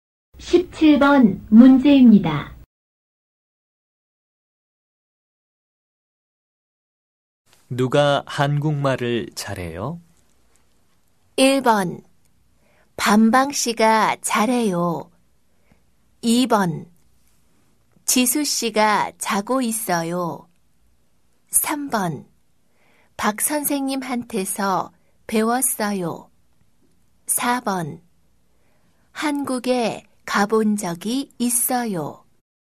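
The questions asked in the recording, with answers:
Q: 누가 한국말을 잘해요?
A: 1: 반방 씨가 잘해요.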